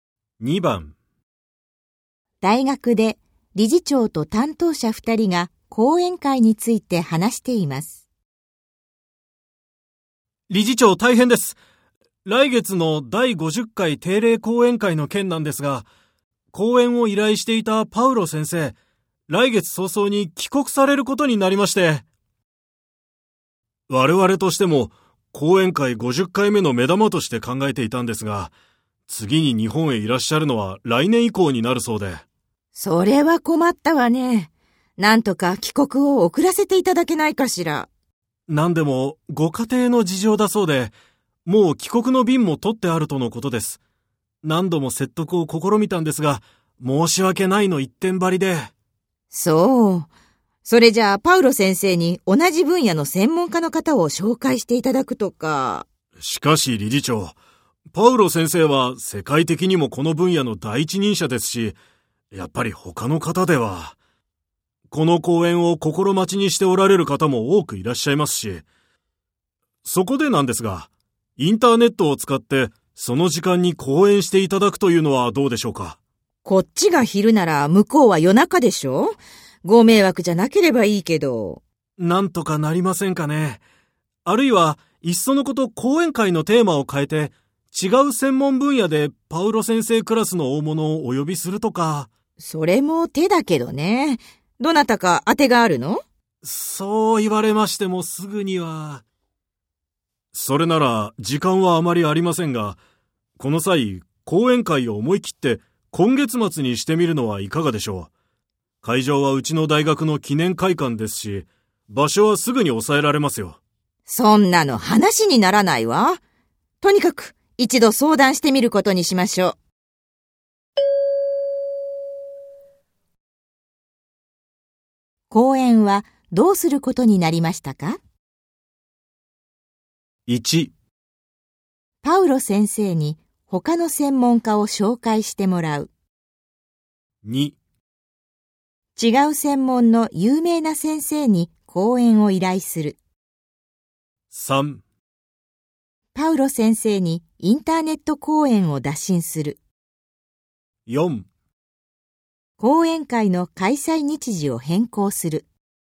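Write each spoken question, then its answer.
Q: 講演はどうすることになりましたか?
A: 3: パウロ先生にインターネット講演を打診する。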